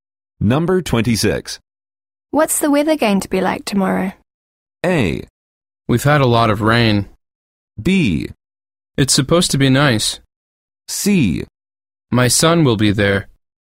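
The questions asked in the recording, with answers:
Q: What's the weather going to be like tomorrow?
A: B: It's supposed to be nice.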